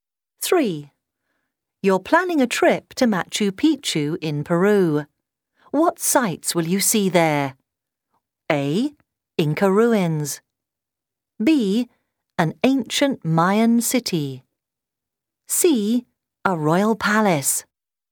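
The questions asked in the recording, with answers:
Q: What sites will you see there?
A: A: Inca ruins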